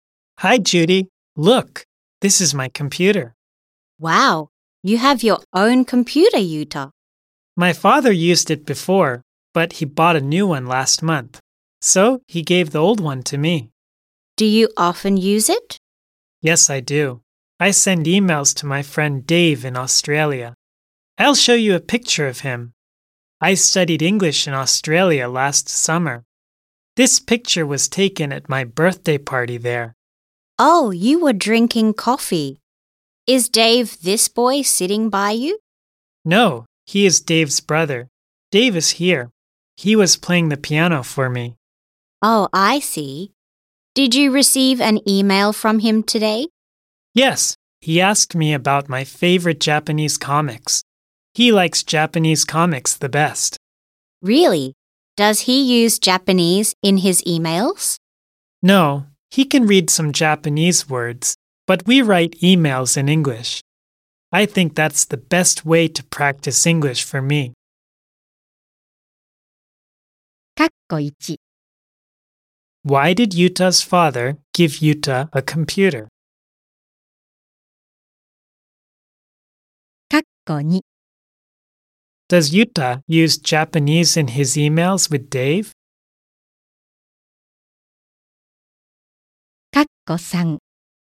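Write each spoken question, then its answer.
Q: Why did Yuta's father give Yuta a computer?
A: Because he bought a new one last month.

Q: Does Yuta use Japanese in his emails with Dave?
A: No, he doesn't. They write emails in English.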